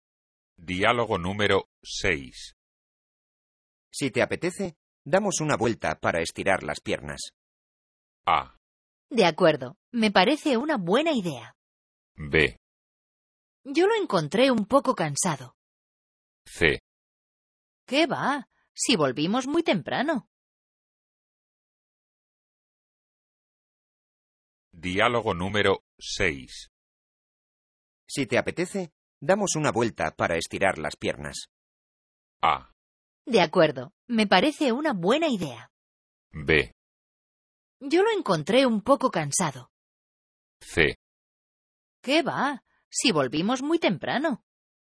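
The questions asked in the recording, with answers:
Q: Si te apetece, damos una vuelta para estirar las piernas.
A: A: De acuerdo, me parece una buena idea.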